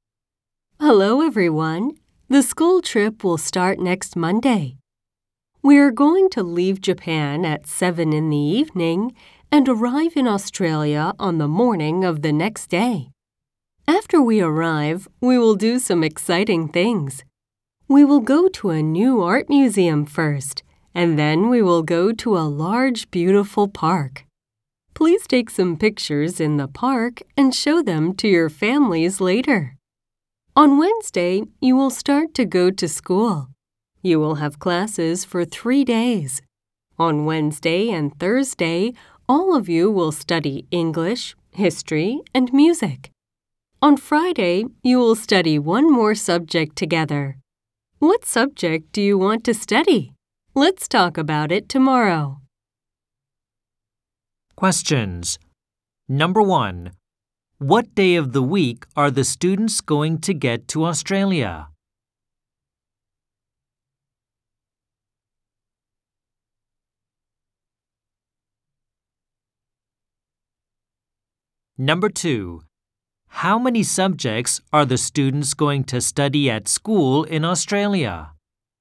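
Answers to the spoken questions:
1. They are going to get there on Tuesday.
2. They are going to study four subjects.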